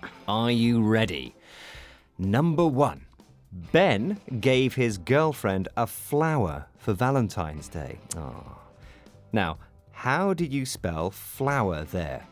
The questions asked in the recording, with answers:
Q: Now, how do you spell flower there?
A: F-L-O-W-E-R.